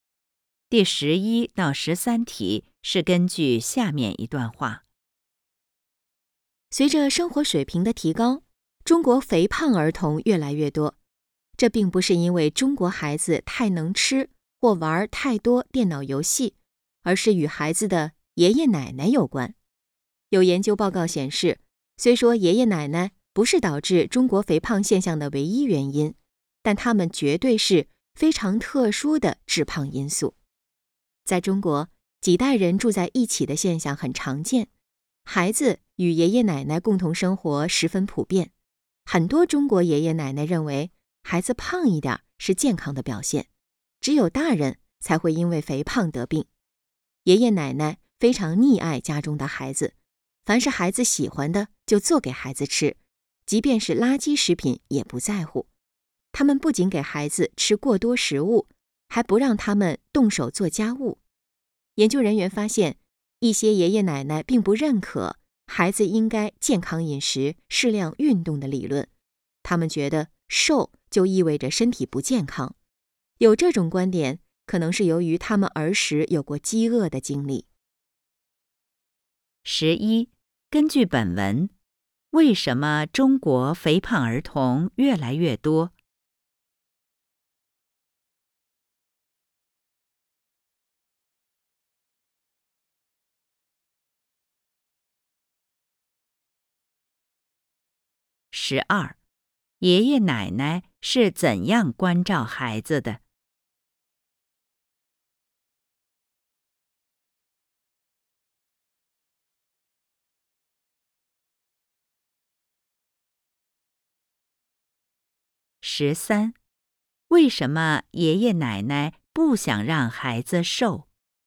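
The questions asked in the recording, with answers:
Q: 根据本文,为什么中国肥胖儿童越来越多?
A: 与孩子的爷爷奶奶有关

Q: 爷爷奶奶是怎样关照孩子的?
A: 溺爱孩子,孩子喜欢的就做给孩子吃,给孩子吃过多食物,不让孩子做家务

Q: 为什么爷爷奶奶不想让孩子瘦?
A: 他们觉得瘦就意味着不健康,可能因为儿时有过饥饿的经历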